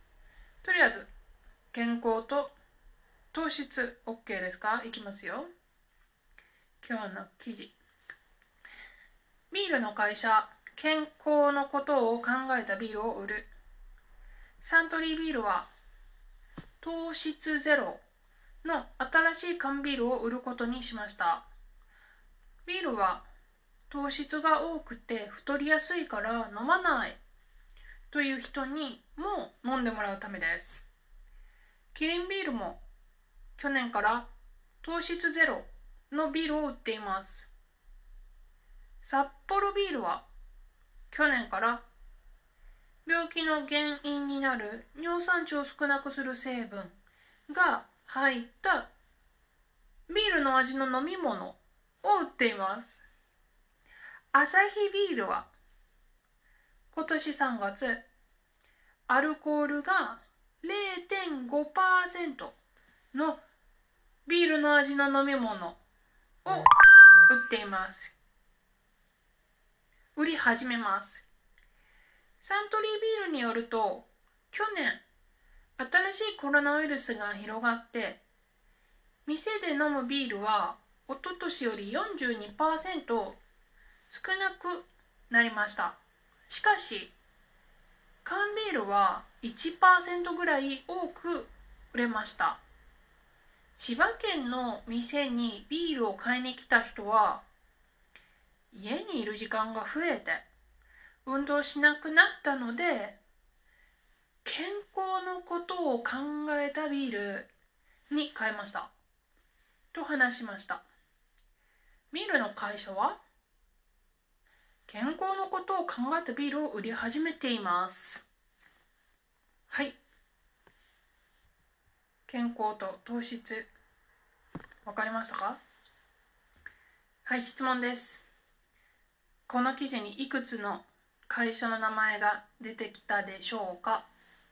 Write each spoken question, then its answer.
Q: この記事にいくつの会社の名前が出てきたでしょうか?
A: サントリービール、キリンビール、サッポロビール、アサヒビール、4つです。